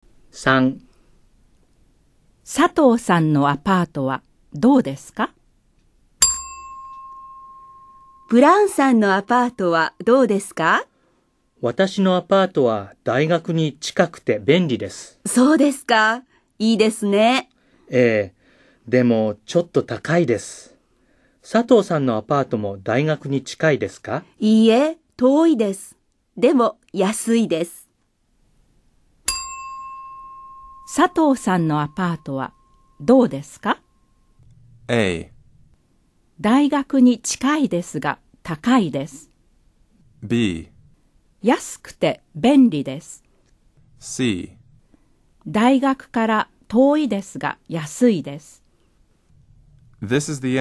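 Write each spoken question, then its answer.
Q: 佐藤さんのアパートはどうですか?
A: C: 大学から遠いですが安いです。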